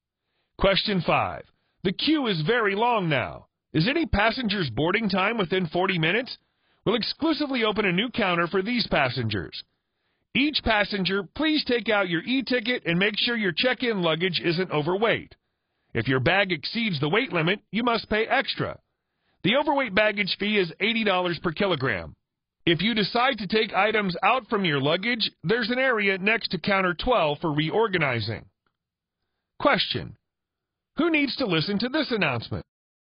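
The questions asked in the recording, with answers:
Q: Who needs to listen to this announcement?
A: Airline passengers waiting in line to check in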